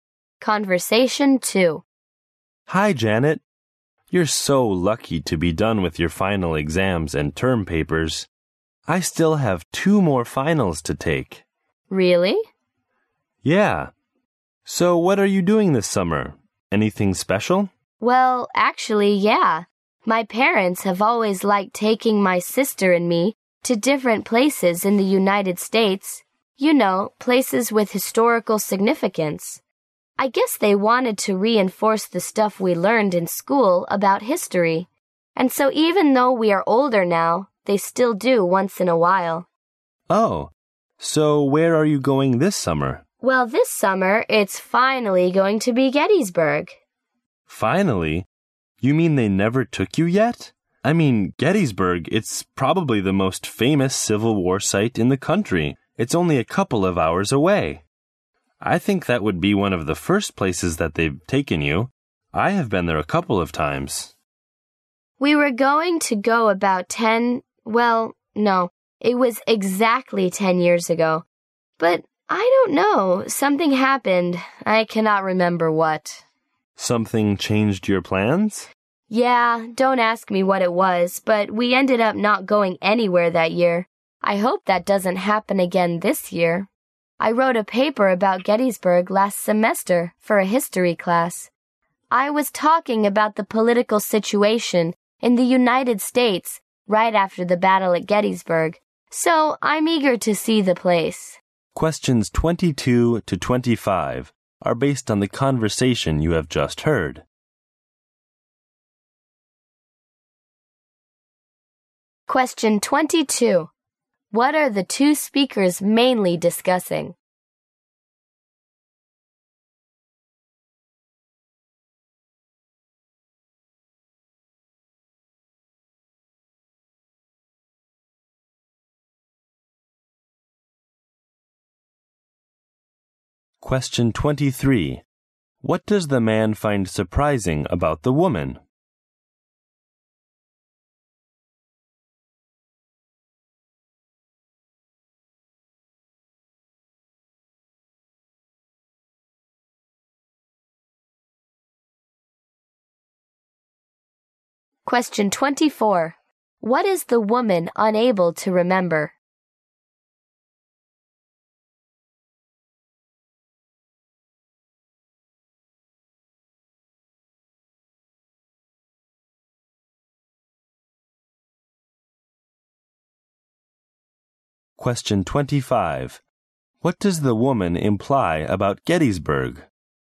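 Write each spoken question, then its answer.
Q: What are the two speakers mainly discussing?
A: The woman's summer trip to Gettysburg

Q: What does the man find surprising about the woman?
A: Her parents had never taken her to Gettysburg

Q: What is the woman unable to remember?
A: What changed their plans to go to Gettysburg ten years ago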